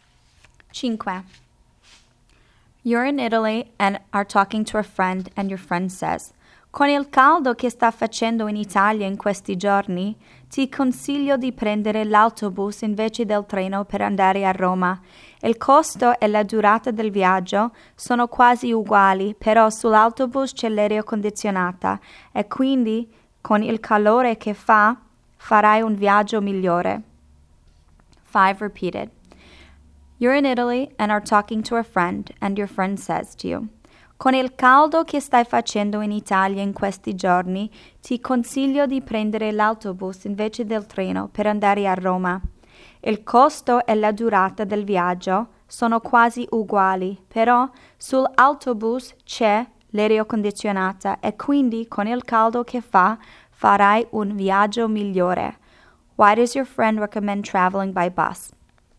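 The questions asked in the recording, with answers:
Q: Why does your friend recommend traveling by bus?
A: The bus has air conditioning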